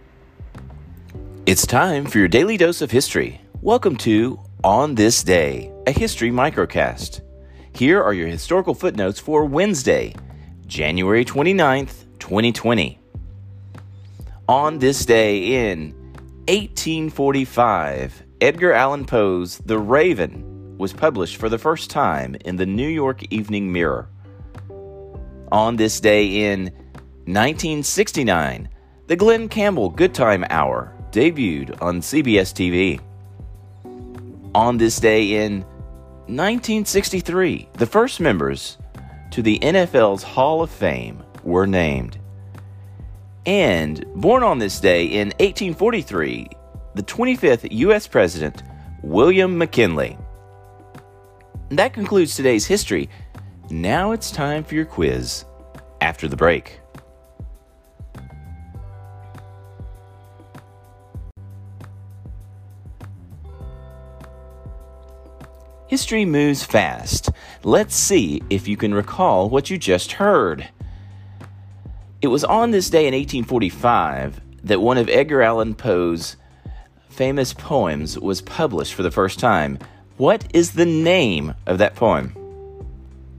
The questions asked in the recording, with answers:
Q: What is the name of that poem?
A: Answer The Raven.